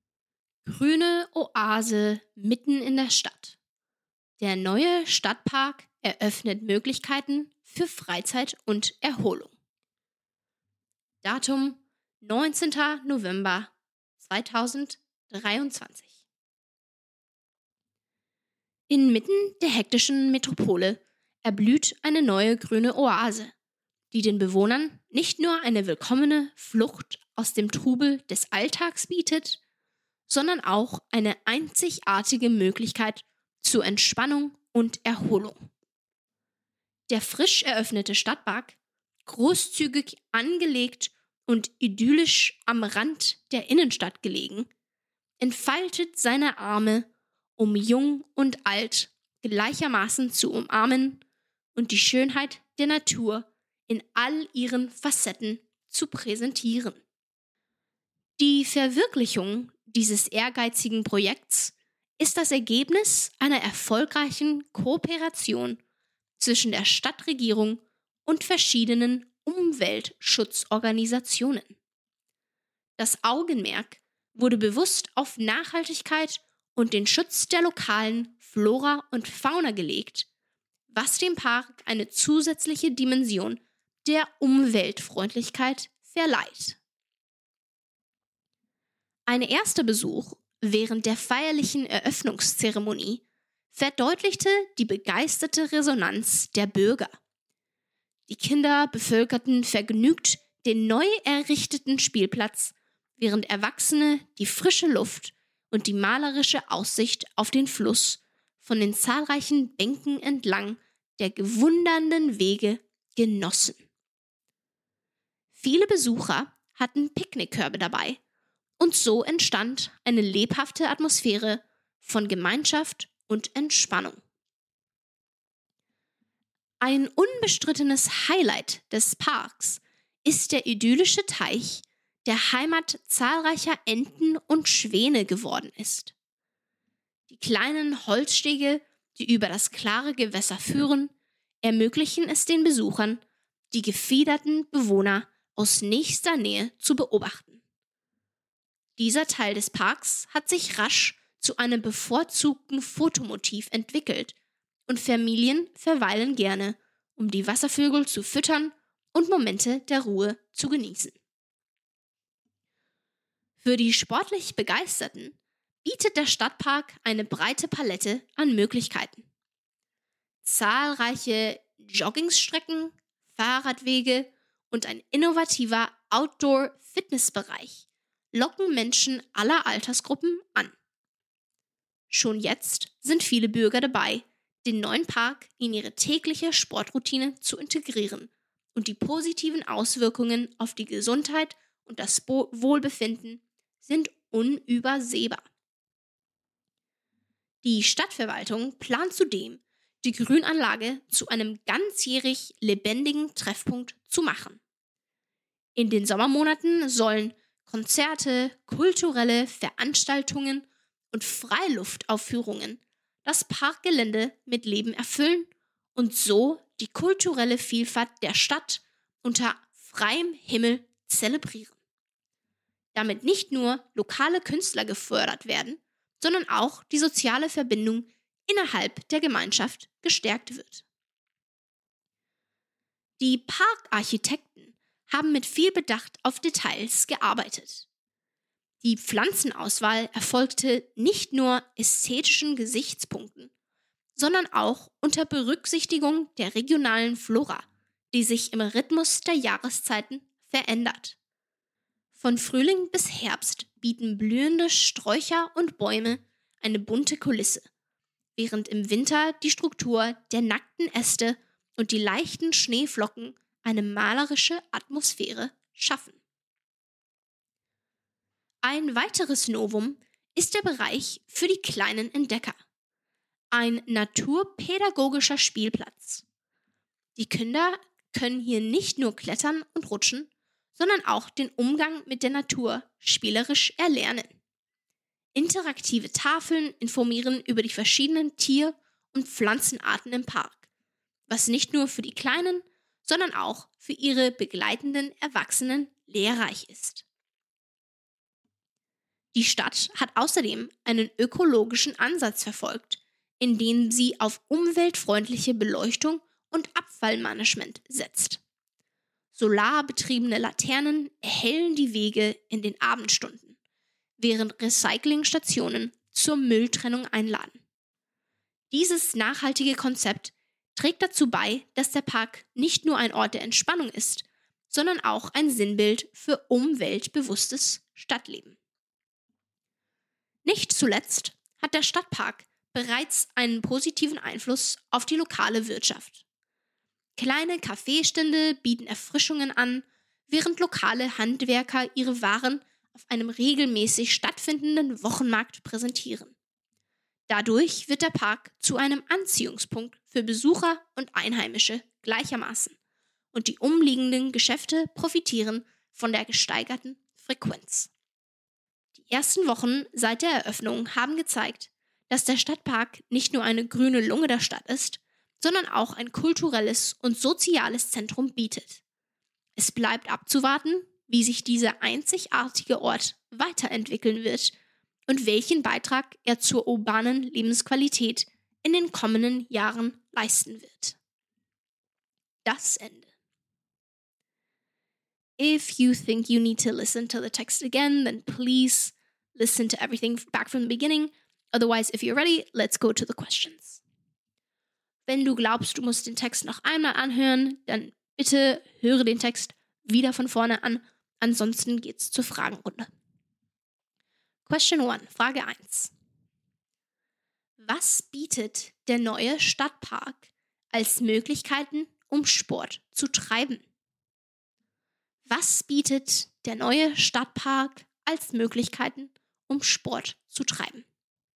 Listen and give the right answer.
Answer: Zahlreiche Joggingstrecken, Fahrradwege und ein innovativer Outdoor-Fitnessbereich locken Menschen aller Altersgruppen an.